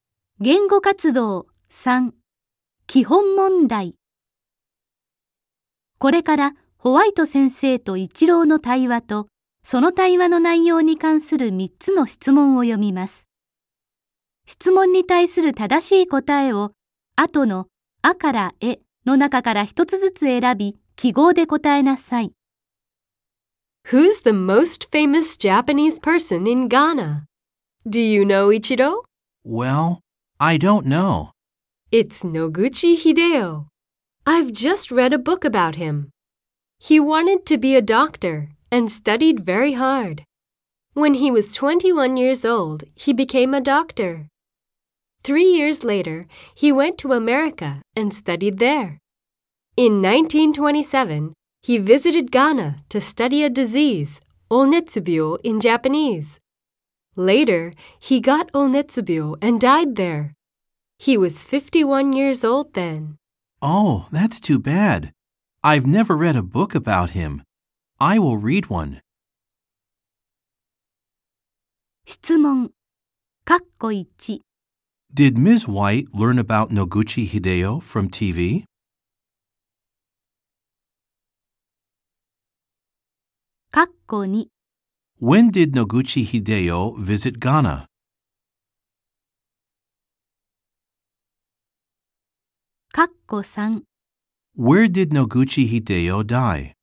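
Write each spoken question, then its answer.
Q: Did Ms. White learn about Noguchi Hideo from TV?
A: No, she didn't. She read a book about him.

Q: When did Noguchi Hideo visit Ghana?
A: In 1927

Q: Where did Noguchi Hideo die?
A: In Ghana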